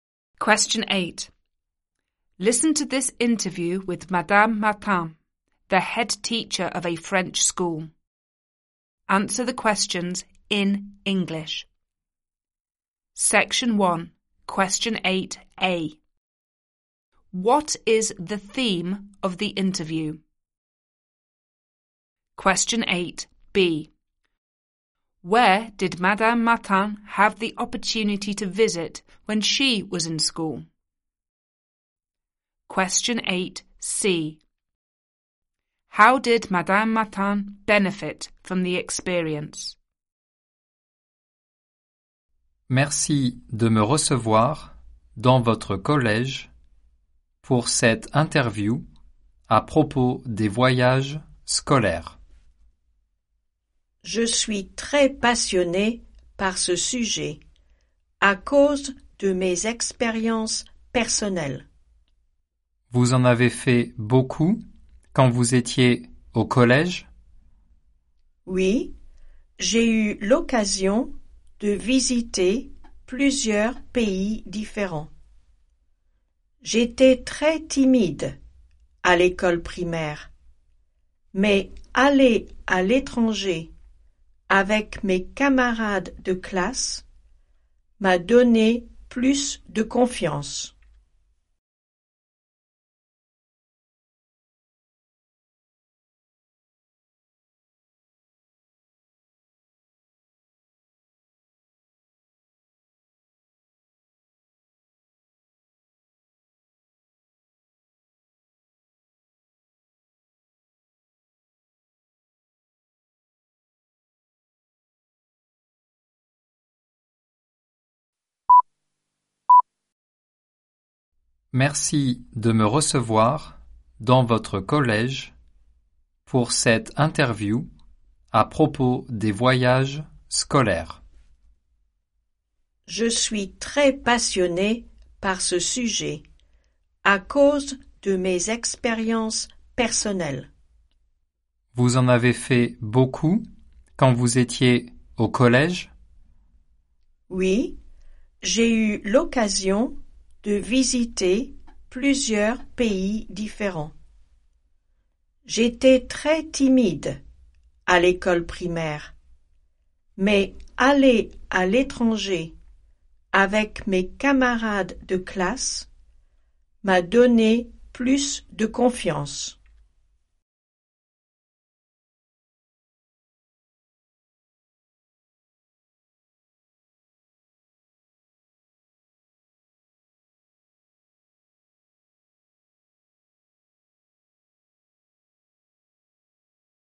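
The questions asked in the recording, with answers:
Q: What is the theme of the interview?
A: School trips

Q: Where did Madame Martin have the opportunity to visit when she was in school?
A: Several different countries

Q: How did Madame Martin benefit from the experience?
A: It gave her more confidence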